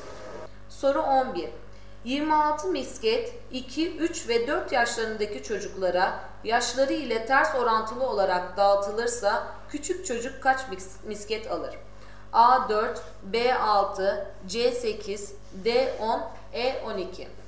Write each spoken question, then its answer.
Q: 26 misket 2, 3 ve 4 yaşlarındaki çocuklara yaşları ile ters orantılı olarak dağıtılırsa küçük çocuk kaç misket alır?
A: Doğru cevap E 12.